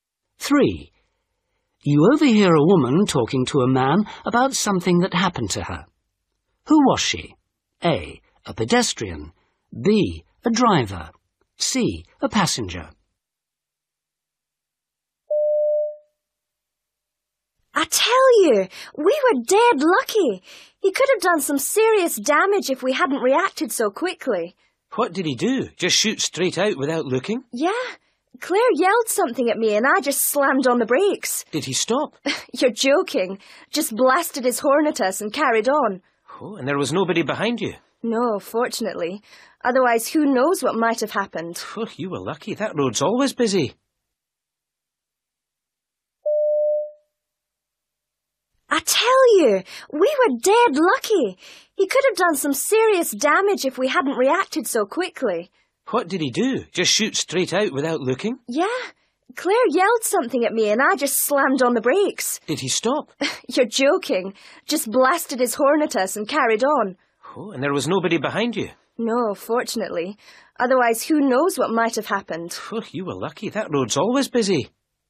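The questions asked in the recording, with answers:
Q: Who was she?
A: B: A driver.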